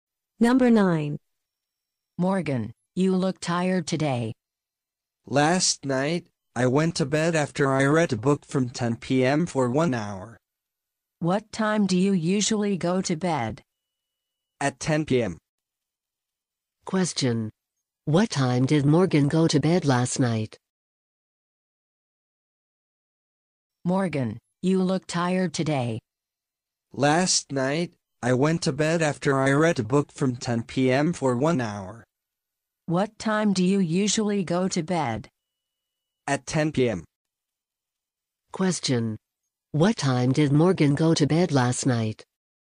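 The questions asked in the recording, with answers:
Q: What time did Morgan go to bed last night?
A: At 11 p.m.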